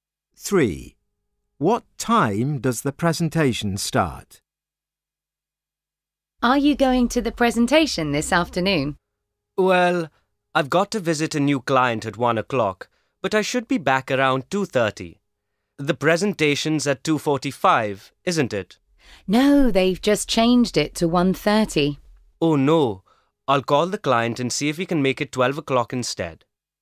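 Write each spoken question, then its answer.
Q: What time does the presentation start?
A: 1:30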